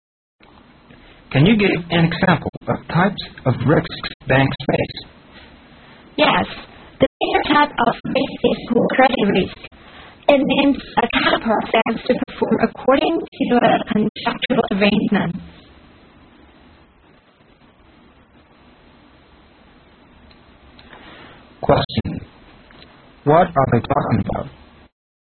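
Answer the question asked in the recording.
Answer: Types of risks banks face (credit risk)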